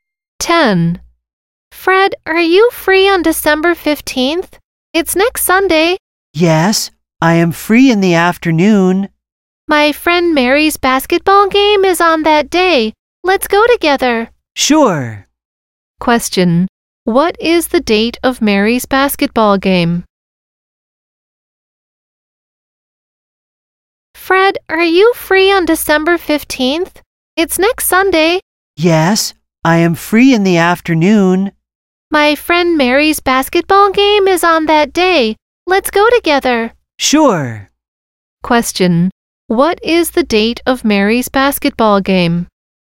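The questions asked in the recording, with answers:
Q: What is the date of Mary's basketball game?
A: December 15th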